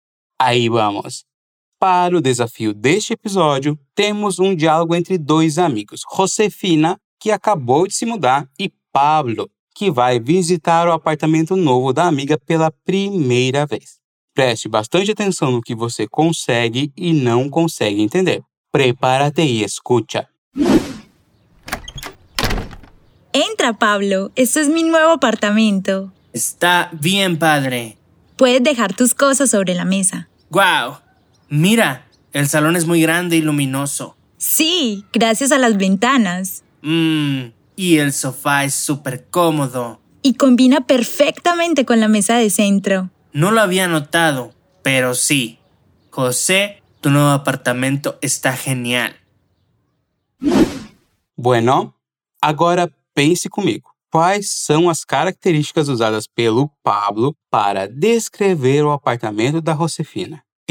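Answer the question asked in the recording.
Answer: Está padre; o salão é muito grande e luminoso; o sofá é super cômodo; o apartamento está genial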